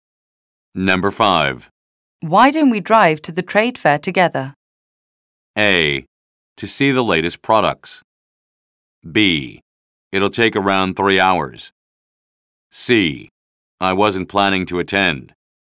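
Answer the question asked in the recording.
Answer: C: I wasn't planning to attend.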